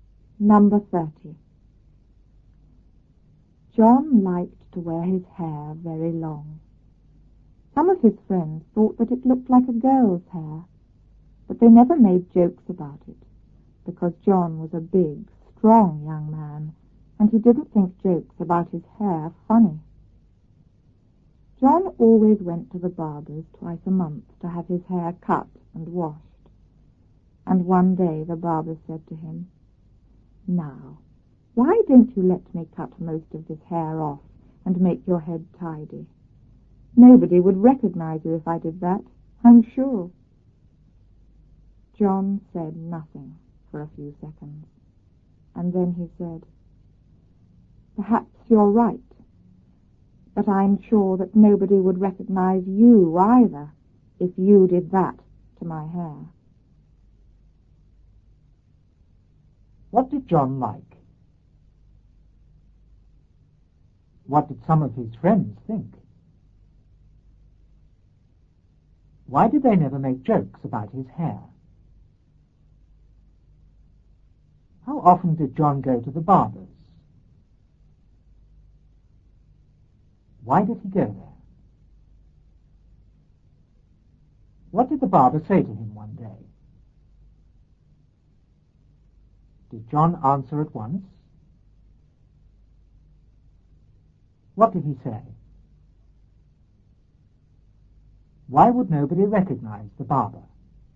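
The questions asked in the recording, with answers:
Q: What did John like?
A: To wear his hair very long

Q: What did some of his friends think?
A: That it looked like a girl's hair

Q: Why did they never make jokes about his hair?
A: Because John was big and strong and didn't think jokes about his hair funny

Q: How often did John go to the barber's?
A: Twice a month

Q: Why did he go there?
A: To have his hair cut and washed

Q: What did the barber say to him one day?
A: Why not let him cut most of the hair off and make his head tidy; nobody would recognize him

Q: Did John answer at once?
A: No, he said nothing for a few seconds

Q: What did he say?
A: Perhaps you're right, but nobody would recognize you either if you did that to my hair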